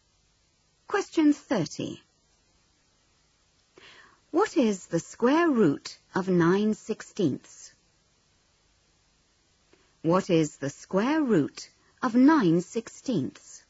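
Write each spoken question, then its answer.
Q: What is the square root of 9/16?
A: 3/4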